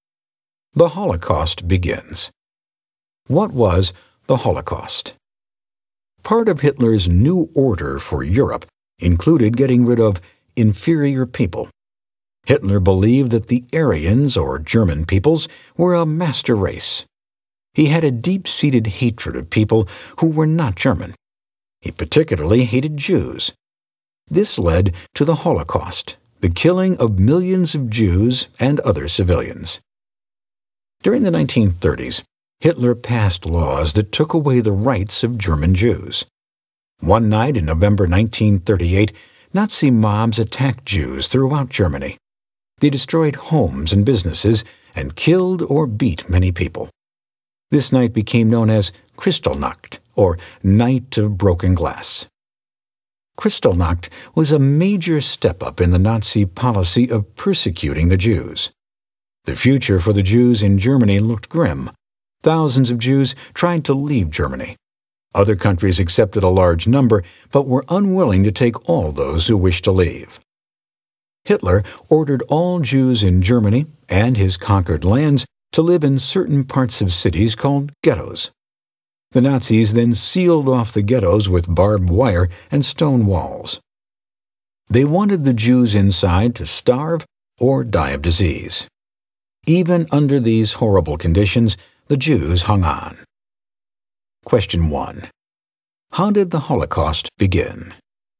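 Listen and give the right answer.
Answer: Hitler passed laws taking away German Jews' rights, Nazi mobs attacked Jews on Kristallnacht (1938), and Jews were forced into sealed ghettos.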